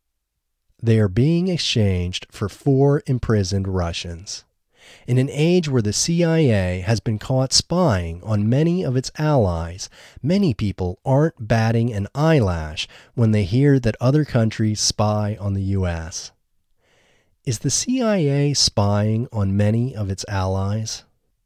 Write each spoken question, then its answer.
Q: Is the CIA spying on many of its allies?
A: Yes, the CIA is spying on many of its allies.